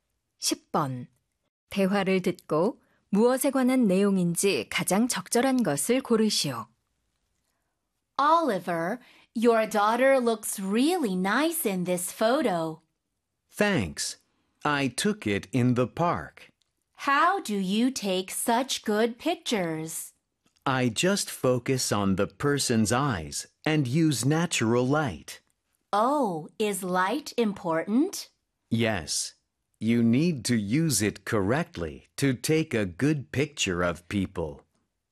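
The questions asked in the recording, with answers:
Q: 대화를 듣고 무엇에 관한 내용인지 가장 적절한 것을 고르시오.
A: 인물 사진을 잘 찍는 방법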